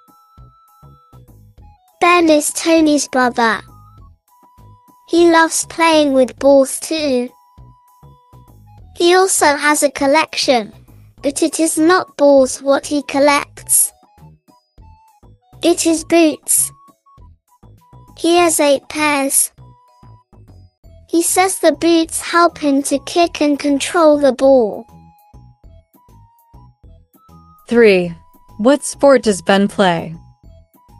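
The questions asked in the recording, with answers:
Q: What sport does Ben play?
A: soccer (football)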